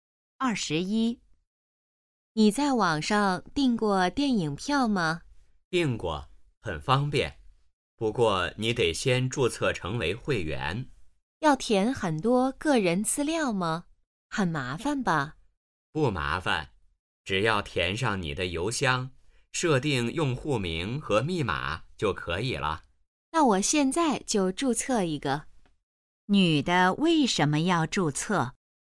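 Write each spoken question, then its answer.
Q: 女的为什么要注册?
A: 想在网上订电影票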